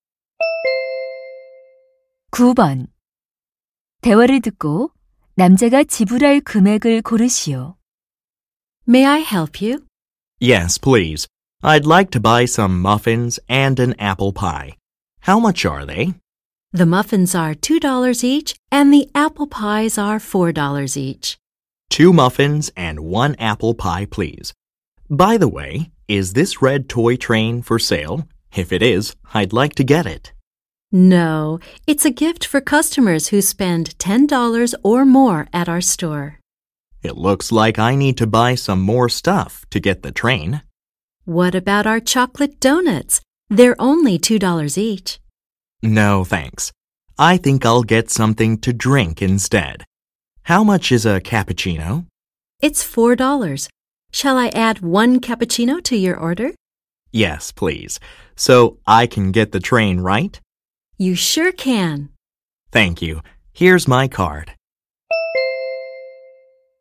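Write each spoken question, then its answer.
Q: 대화를 듣고 남자가 지불할 금액을 고르시오.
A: 12달러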